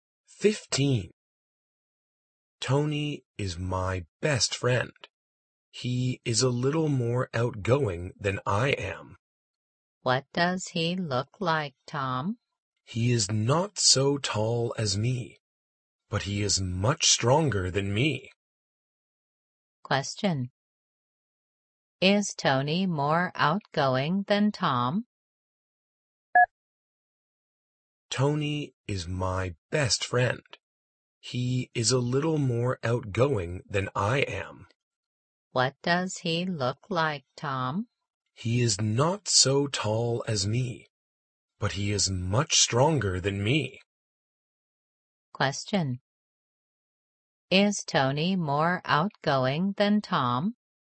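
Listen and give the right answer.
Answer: Yes, a little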